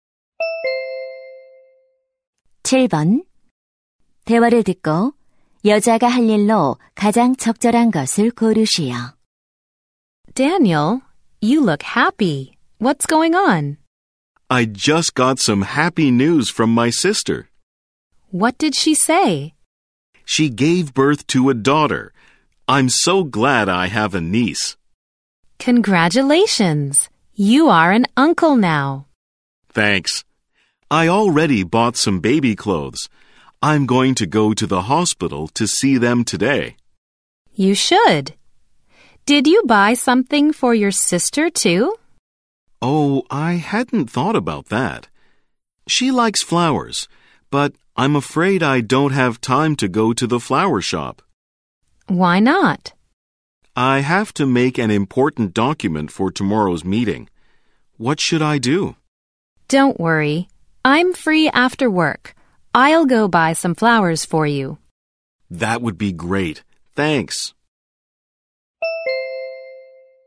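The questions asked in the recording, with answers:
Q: 대화를 듣고 여자가 할 일로 가장 적절한 것을 고르시오.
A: 꽃 사러 가기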